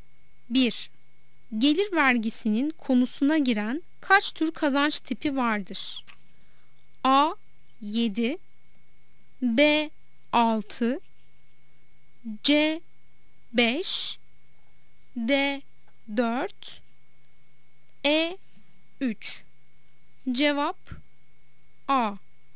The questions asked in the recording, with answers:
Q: Gelir vergisinin konusuna giren kaç tür kazanç tipi vardır?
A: Cevap A. 7